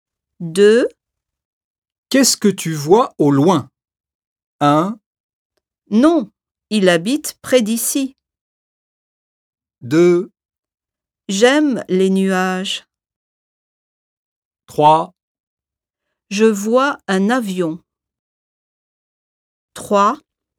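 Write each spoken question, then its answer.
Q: Qu'est-ce que tu vois au loin ?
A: 3: Je vois un avion.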